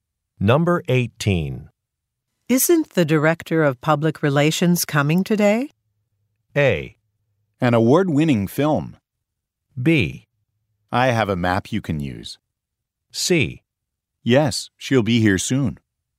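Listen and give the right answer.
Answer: C: Yes, she'll be here soon.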